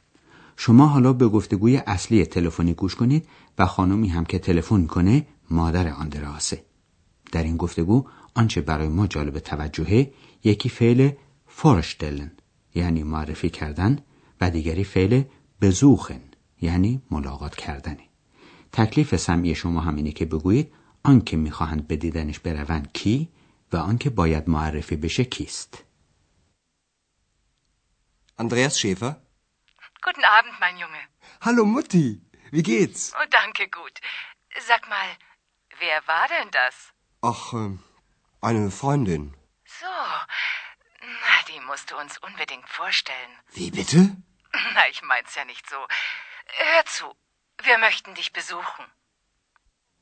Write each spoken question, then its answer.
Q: تکلیف سمعی شما هم اینه که بگویید آن که میخواهند به دیدنش بروند کی و آن که باید معرفی بشه کیست.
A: خب، مادر آندراس میخواد به دیدن او بیاد و میل داره که اکس رو به او معرفی کنن.